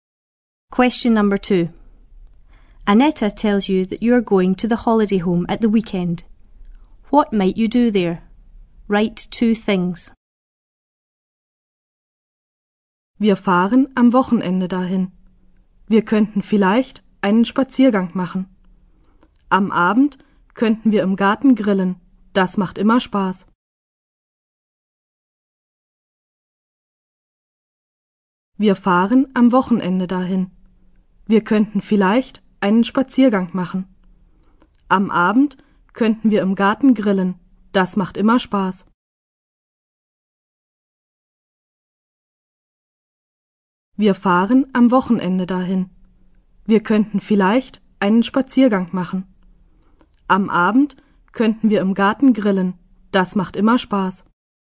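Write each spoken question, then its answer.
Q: What might you do there? Write two things.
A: Go for a walk; have a barbecue in the garden in the evening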